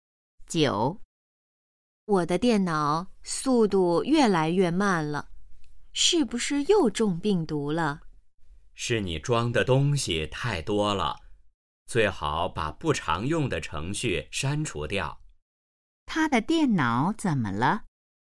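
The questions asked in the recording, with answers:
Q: 他的电脑怎么了?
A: 速度越来越慢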